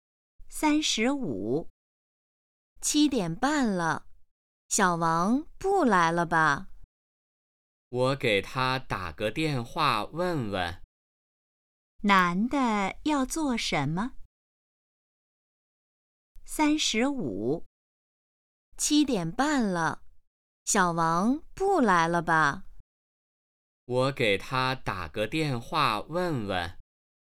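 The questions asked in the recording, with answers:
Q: 男的要做什么?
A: 给小王打电话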